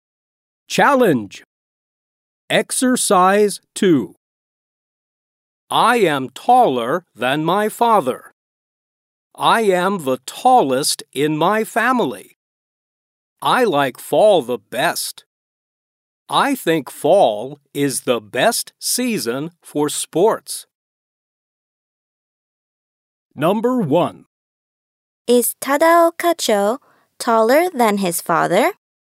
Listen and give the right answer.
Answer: Yes, he is.